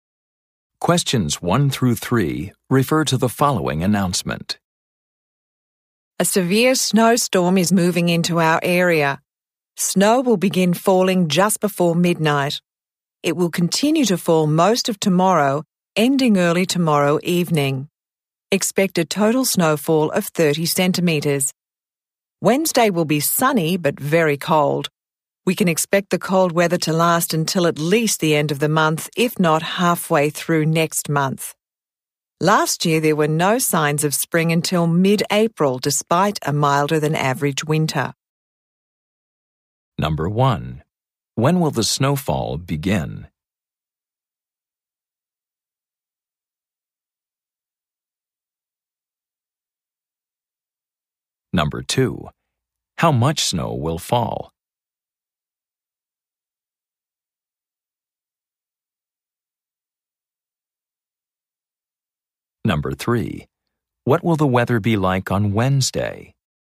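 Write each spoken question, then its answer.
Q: When will the snowfall begin?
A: Just before midnight

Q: How much snow will fall?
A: 30 centimetres

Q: What will the weather be like on Wednesday?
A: Sunny but very cold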